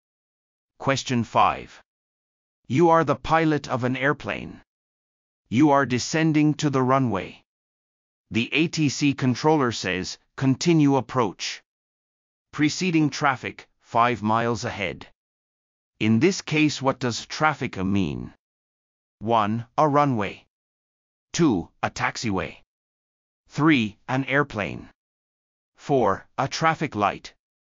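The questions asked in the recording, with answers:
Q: In this case, what does traffic mean?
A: 3: An airplane.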